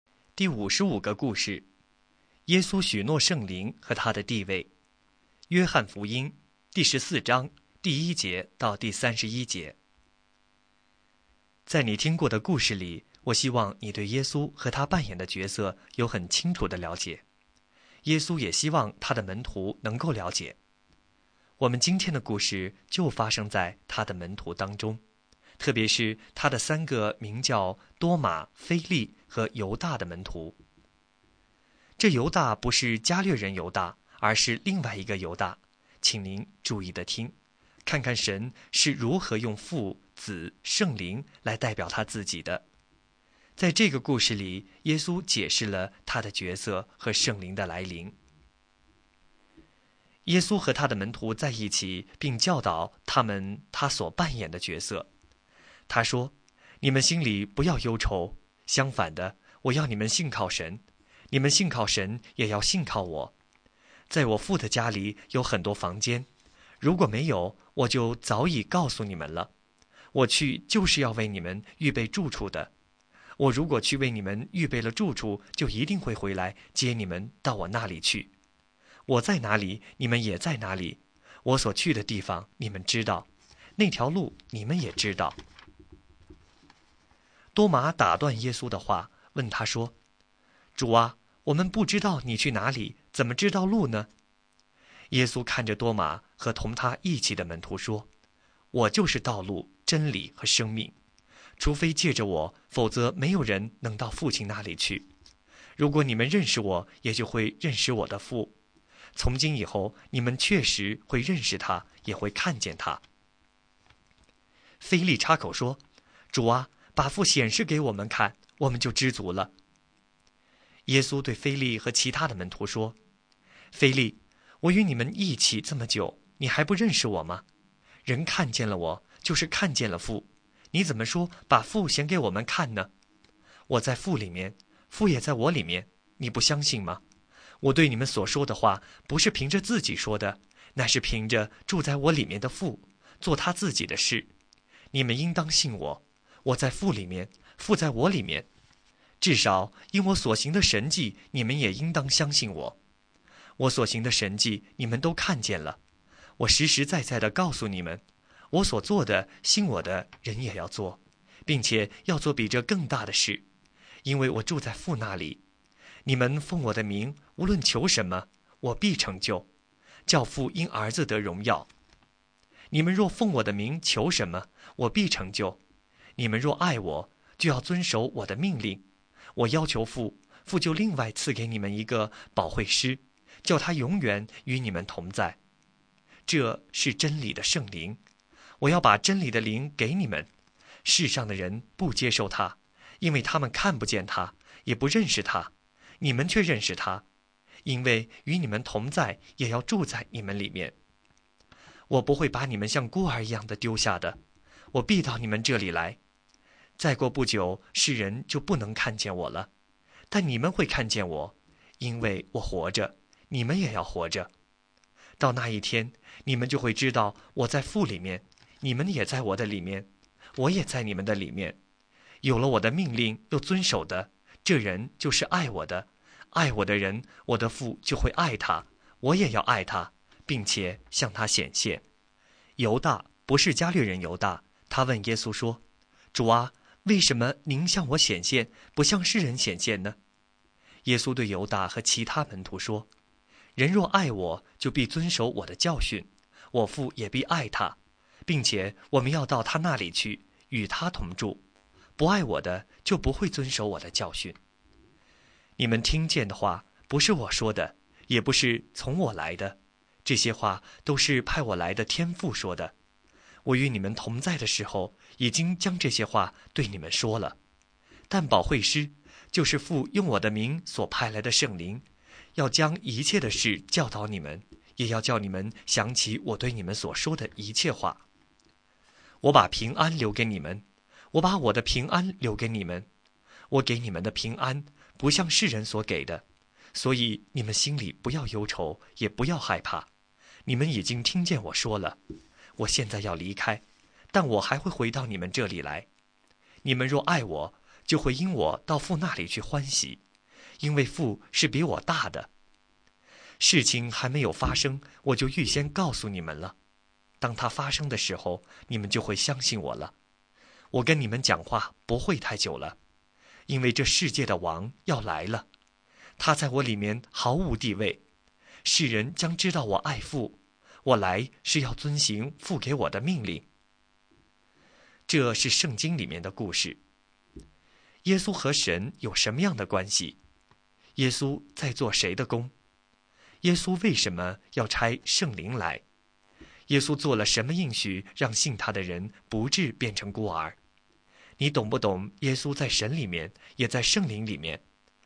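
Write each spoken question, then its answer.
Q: 耶稣和神有什么样的关系?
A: 耶稣在父里面,父也在耶稣里面;看见了耶稣就是看见了父

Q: 耶稣在做谁的工?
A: 父(神)的工

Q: 耶稣为什么要差圣灵来?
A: 让圣灵永远与门徒同在,将一切的事教导他们,并叫他们想起耶稣所说的一切话

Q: 耶稣做了什么应许,让信他的人不至变成孤儿?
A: 他必回到他们这里来,并求父赐下保惠师圣灵与他们同在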